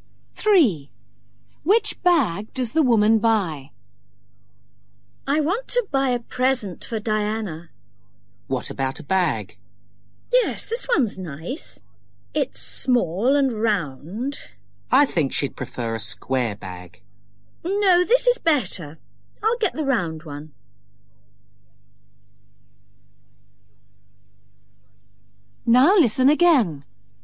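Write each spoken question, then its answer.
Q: Which bag does the woman buy?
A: the small round one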